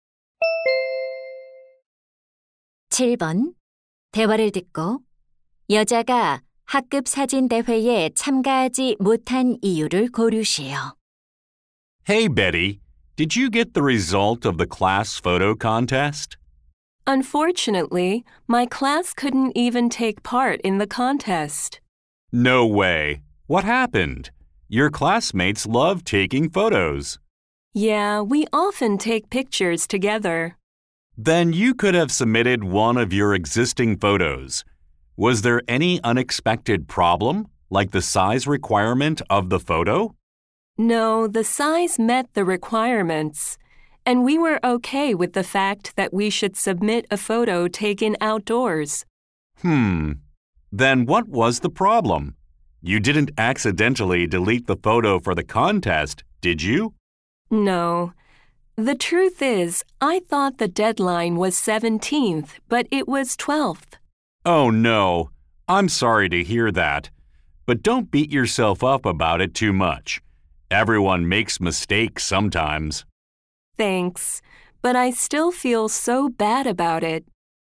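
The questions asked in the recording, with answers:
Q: 여자가 학급 사진 대회에 참가하지 못한 이유를 고르시오.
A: 마감일을 착각해서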